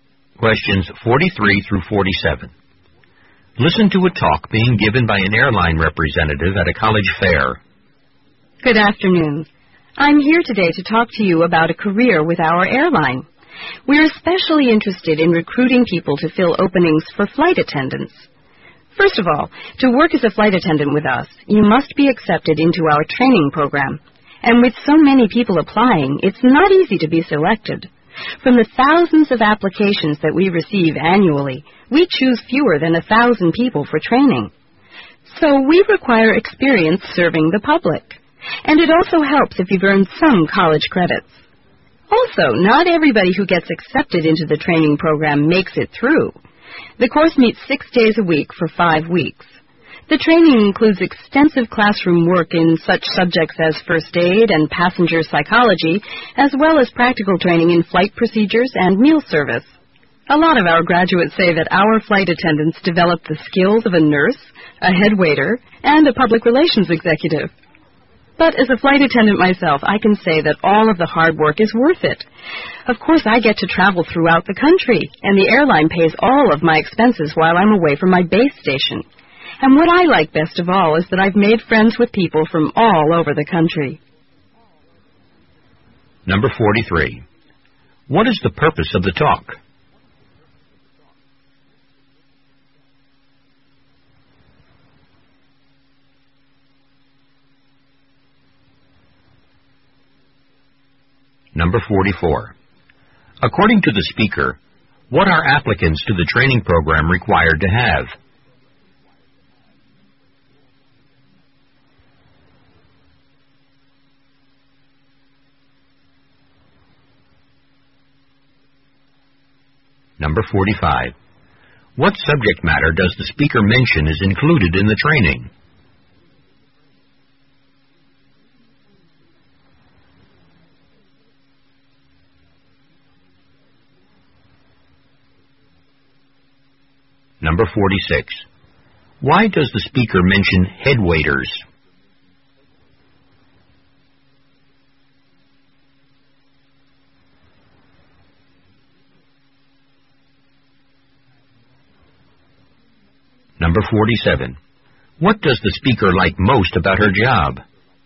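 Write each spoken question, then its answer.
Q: What is the purpose of the talk?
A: To recruit flight attendants for the airline

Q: According to the speaker, what are applicants to the training program required to have?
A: Experience serving the public

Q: What subject matter does the speaker mention is included in the training?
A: First aid and passenger psychology

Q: Why does the speaker mention head waiters?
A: To show the variety of skills flight attendants develop

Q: What does the speaker like most about her job?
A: Making friends with people from all over the country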